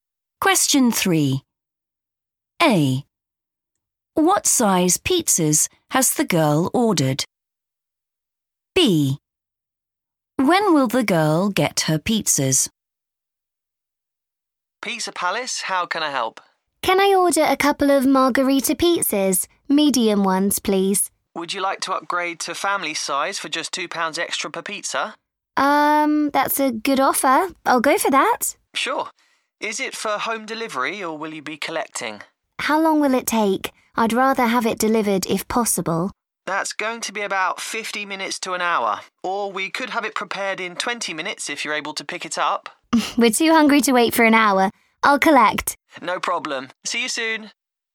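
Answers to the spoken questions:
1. family size
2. in 20 minutes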